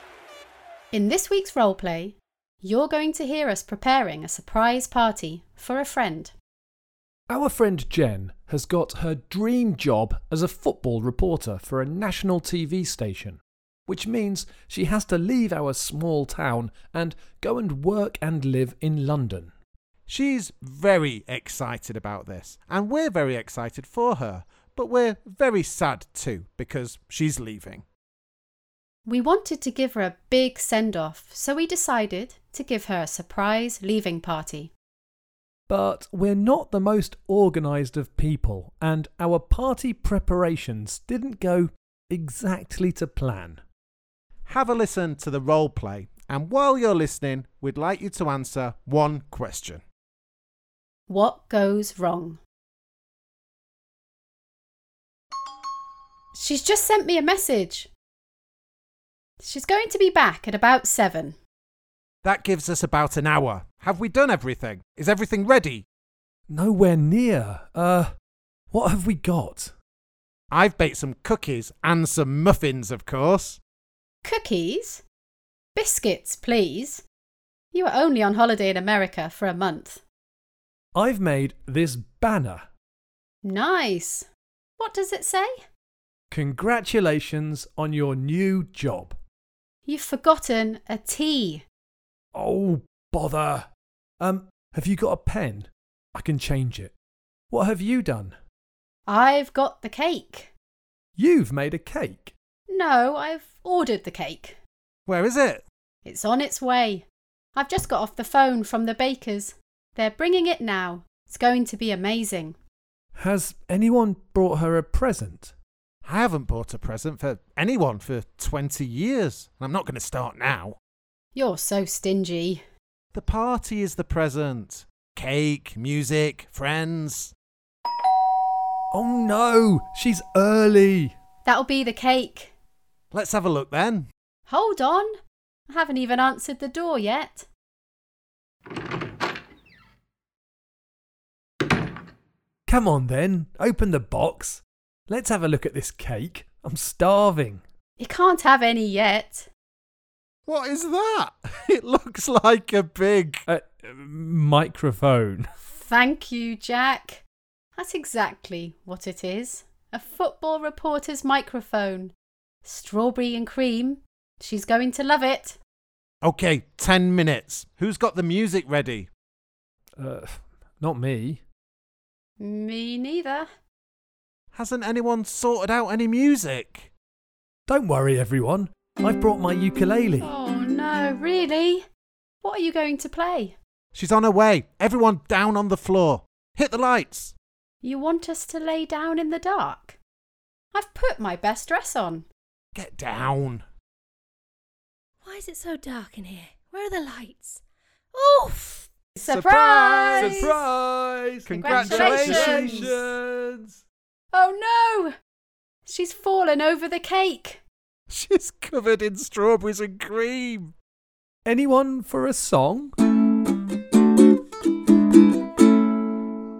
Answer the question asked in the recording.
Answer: I had made a banner to put up, and it was meant to say congratulations, but it said congratulations.